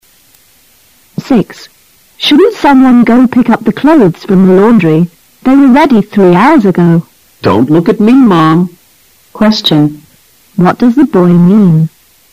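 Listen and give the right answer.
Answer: He doesn't want to pick up the clothes himself.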